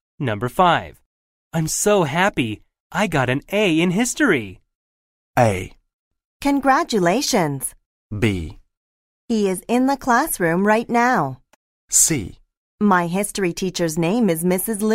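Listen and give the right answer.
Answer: A: Congratulations.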